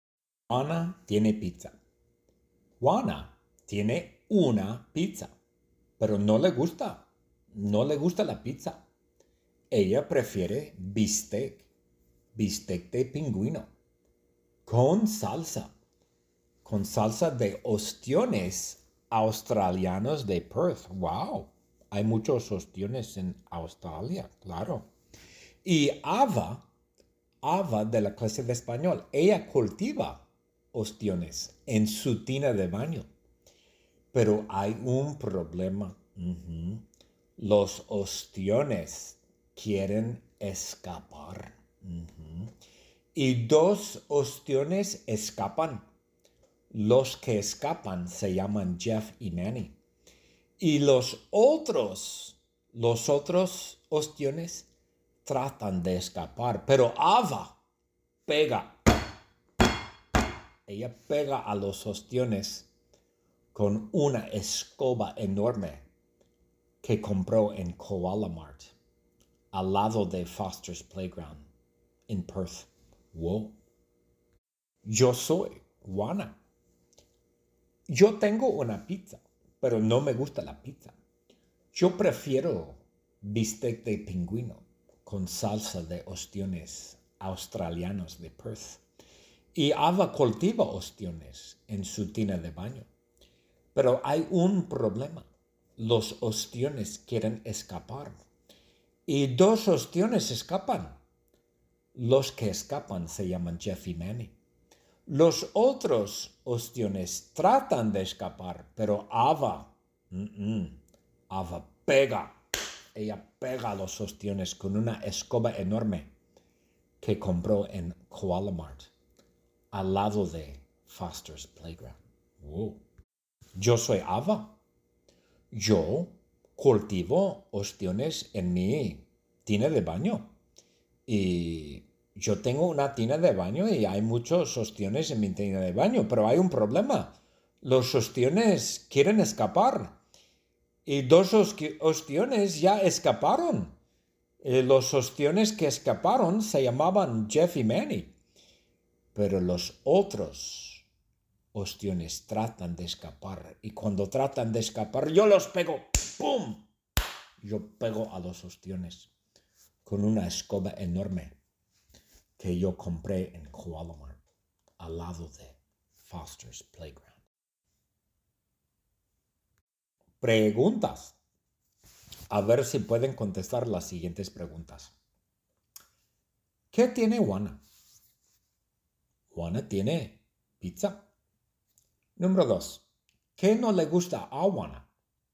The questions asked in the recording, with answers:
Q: ¿Qué no le gusta a Juana?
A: A Juana no le gusta pizza.